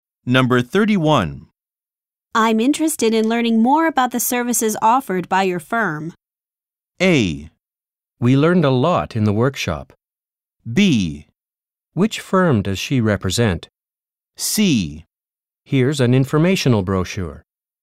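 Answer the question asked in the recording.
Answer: C: Here's an informational brochure.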